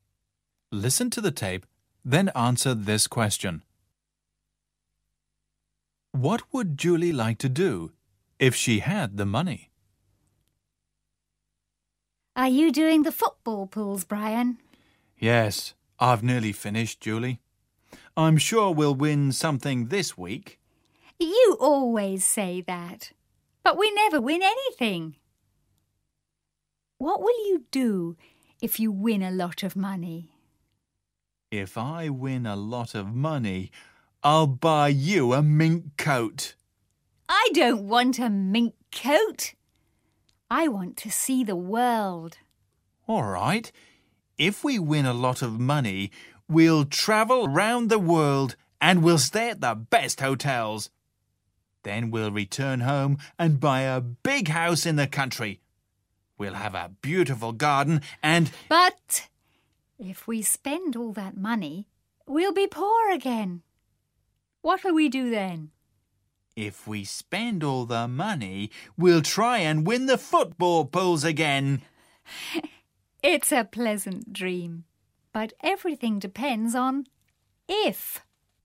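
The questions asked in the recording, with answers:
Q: What would Julie like to do if she had the money?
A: See the world (travel around the world)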